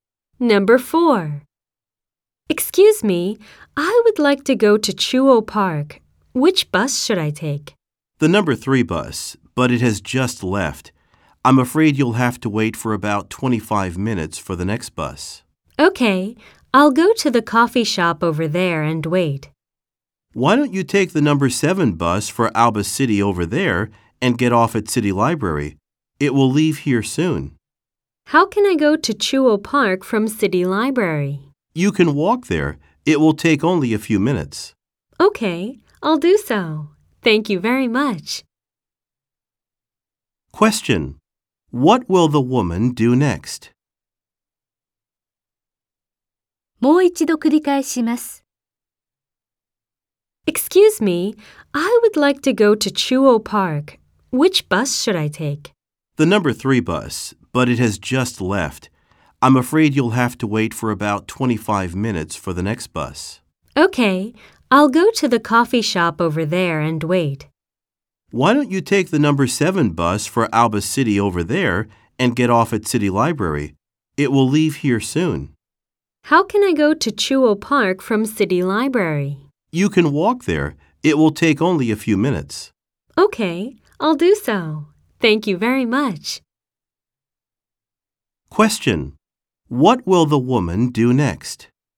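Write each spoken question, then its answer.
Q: What will the woman do next?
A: Take the number 7 bus and get off at City Library.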